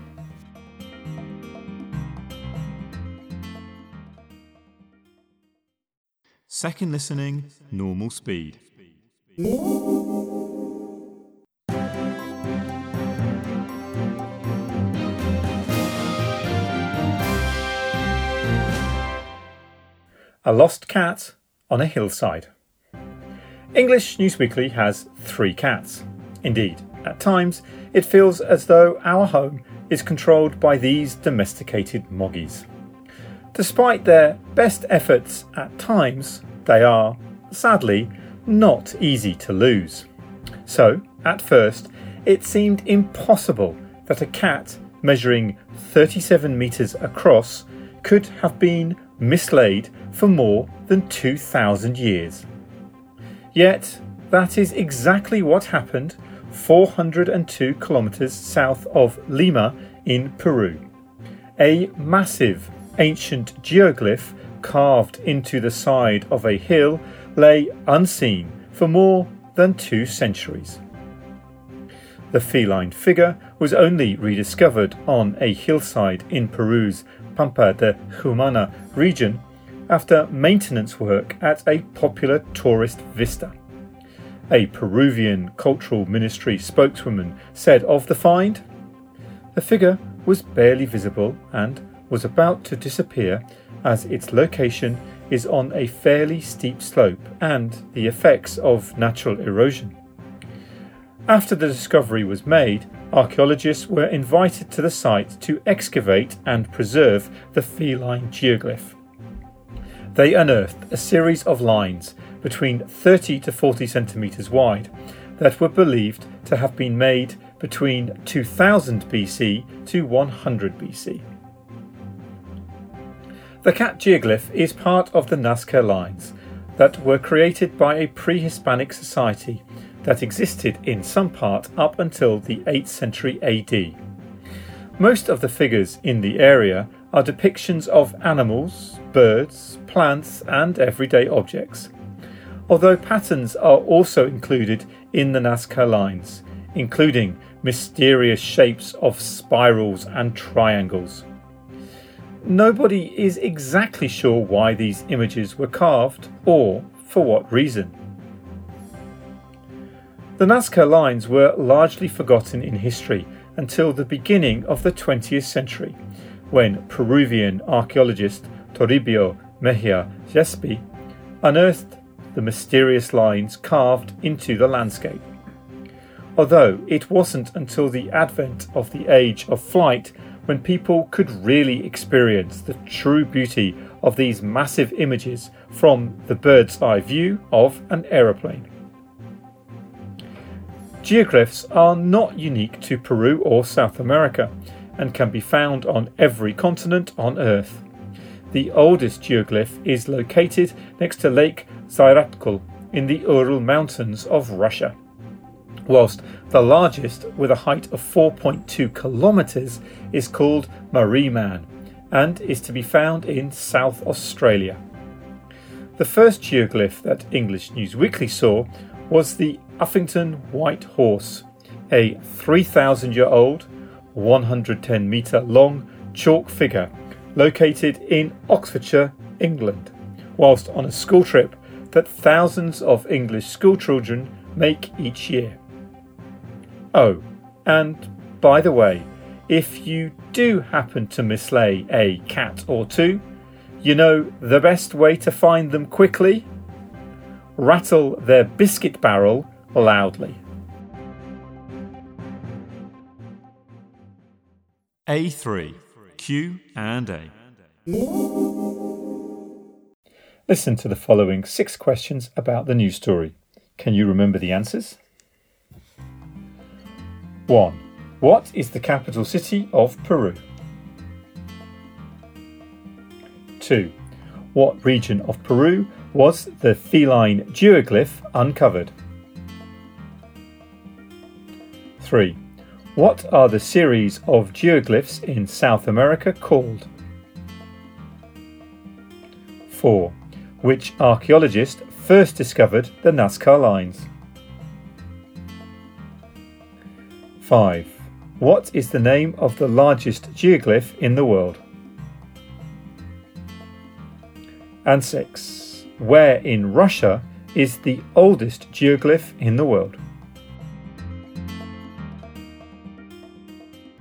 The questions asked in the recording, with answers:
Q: What region of Peru was the feline geoglyph uncovered?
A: 2. Pampa de Humana.

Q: What are the series of geoglyphs in South America called?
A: 3. Nazca Lines.

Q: Which archaeologist first discovered the Nazca lines?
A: 4. Toribio Mejia Jespi.

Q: What is the name of the largest geoglyph in the world?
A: 5. Mariman.

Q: Where in Russia is the oldest geoglyph in the world?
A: 6. Lake Zairatkul.